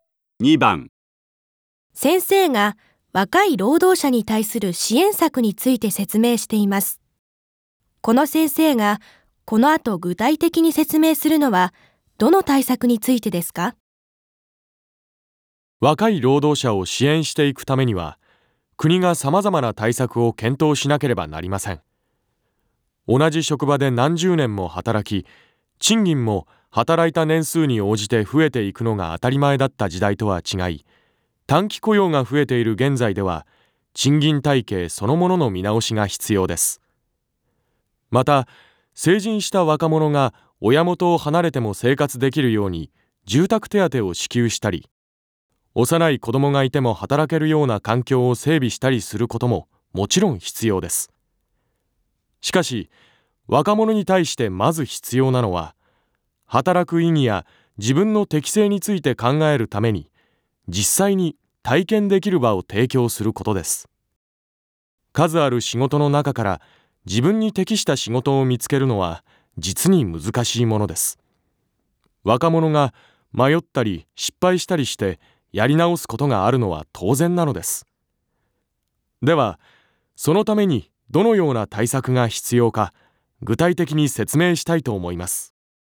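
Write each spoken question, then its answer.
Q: この先生がこの後具体的に説明するのはどの対策についてですか?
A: 若者が実際に仕事を体験できる場を提供する対策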